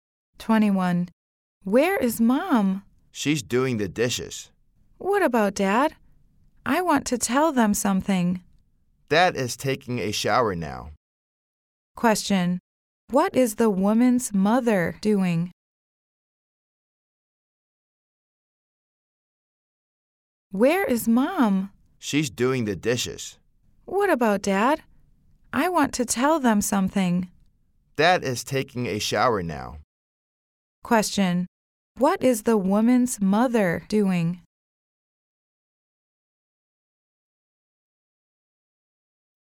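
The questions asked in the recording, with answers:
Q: Question. What is the woman's mother doing?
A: Doing the dishes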